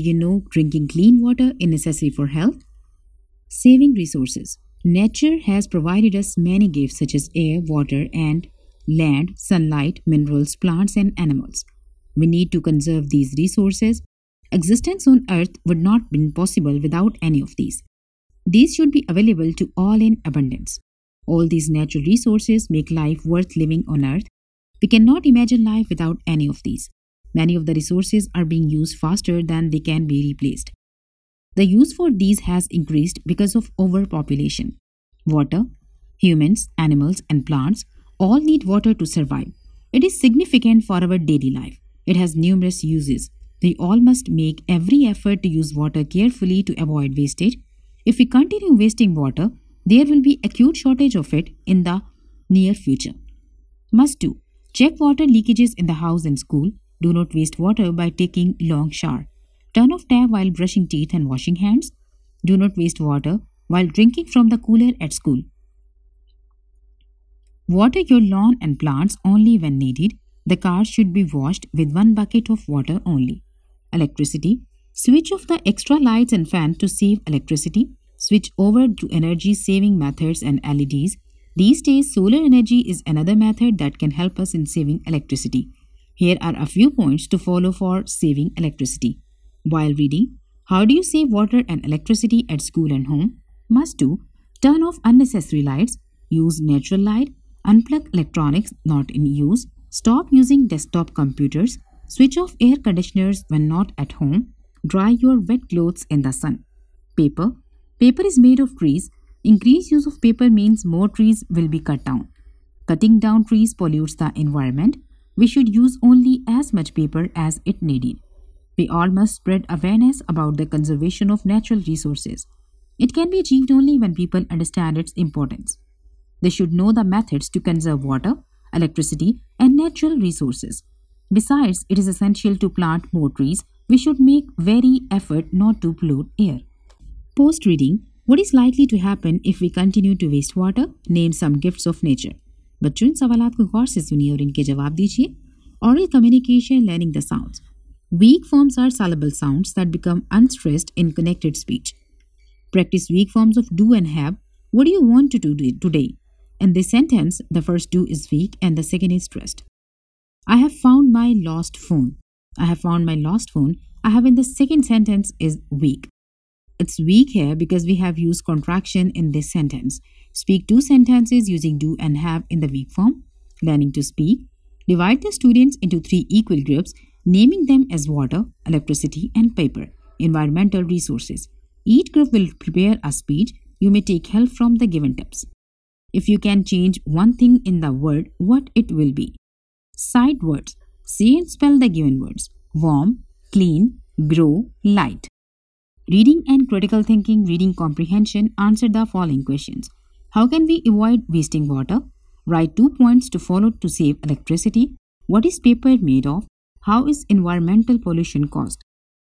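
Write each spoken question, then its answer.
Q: what is likely to happen if we continue to waste water?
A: There will be an acute shortage of water in the near future.

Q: Name some gifts of nature.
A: Air, water, land, sunlight, minerals, plants and animals

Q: How can we avoid wasting water?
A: Check leakages, take short showers, turn off the tap while brushing, and water plants only when needed

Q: Write two points to follow to save electricity.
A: Turn off unnecessary lights; unplug electronics not in use

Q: What is paper made of?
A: Trees

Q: How is environmental pollution caused?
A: By cutting down trees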